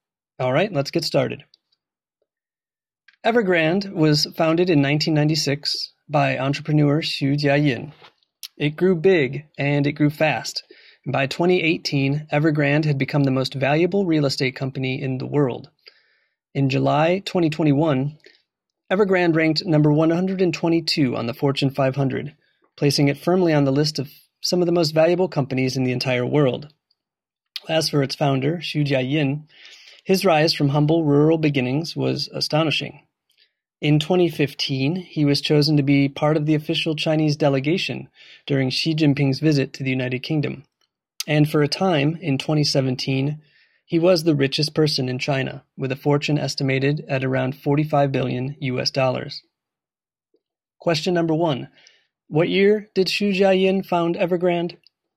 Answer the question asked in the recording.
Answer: He founded the real estate company back in 1996.